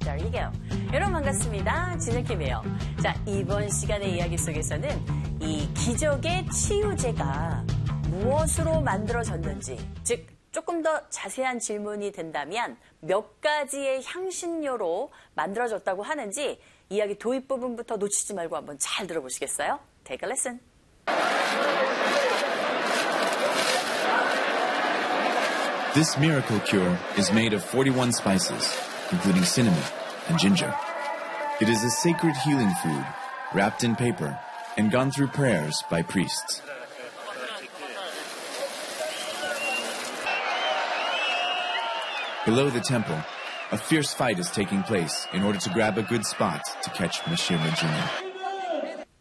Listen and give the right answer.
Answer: 네, 바로 41가지의 향신료로 만들어졌다고 합니다.